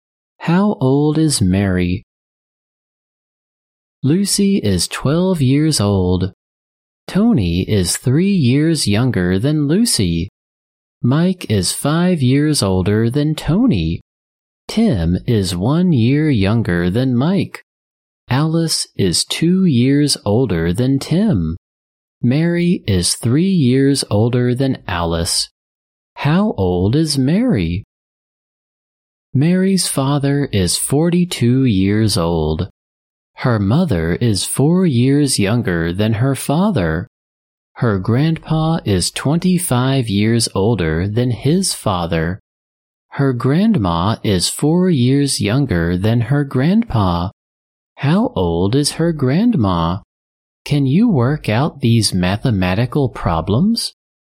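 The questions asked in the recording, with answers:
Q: How old is Mary?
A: 18 years old

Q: How old is her grandma?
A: 63 years old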